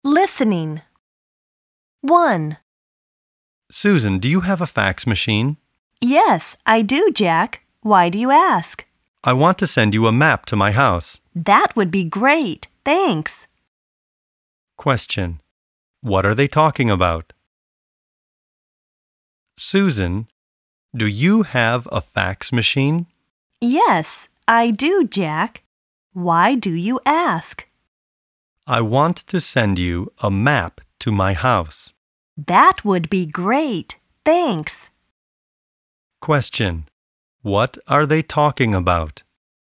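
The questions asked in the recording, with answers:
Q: What are they talking about?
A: A map to Jack's house (sending it by fax)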